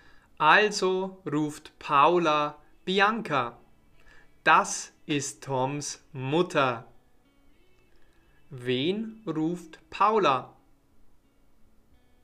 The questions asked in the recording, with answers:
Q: Wen ruft Paula?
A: Bianca. Sie ruft Bianca.